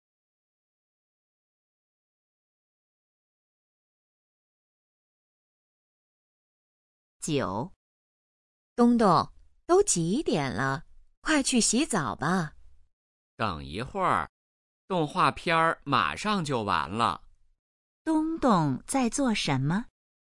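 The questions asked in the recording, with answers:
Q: 东东在做什么?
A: 看动画片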